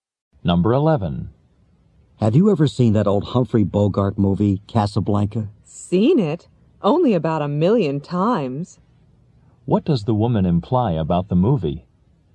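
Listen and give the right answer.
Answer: She has seen it many times.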